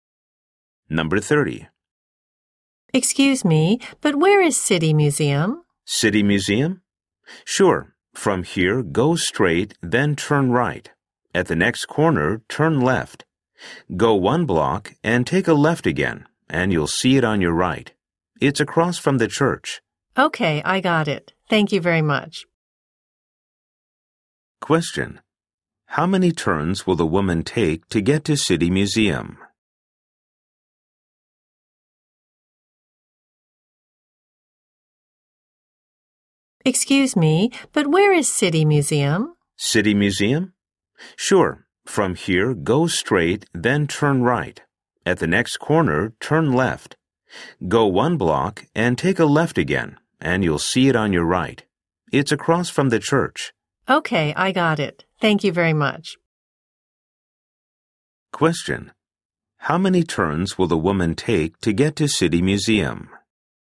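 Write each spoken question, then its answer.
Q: How many turns will the woman take to get to City Museum?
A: Three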